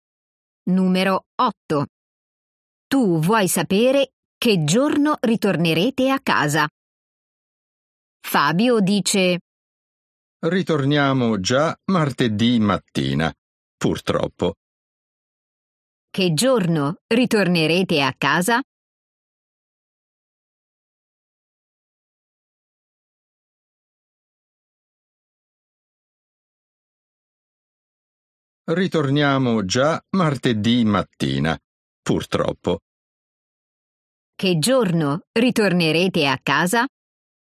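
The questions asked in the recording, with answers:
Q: Che giorno ritornerete a casa?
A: Martedì mattina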